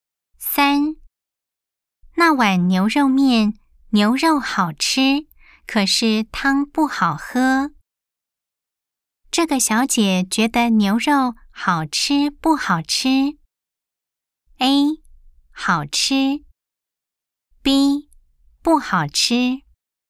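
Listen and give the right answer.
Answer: A: 好吃。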